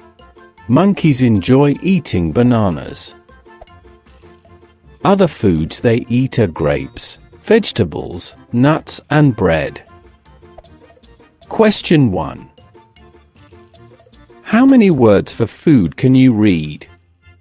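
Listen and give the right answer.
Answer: Five: bananas, grapes, vegetables, nuts, and bread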